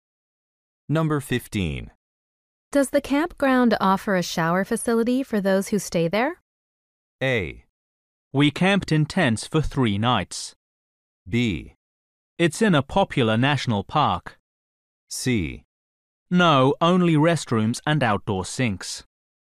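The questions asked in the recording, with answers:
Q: Does the campground offer a shower facility for those who stay there?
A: C: No, only restrooms and outdoor sinks.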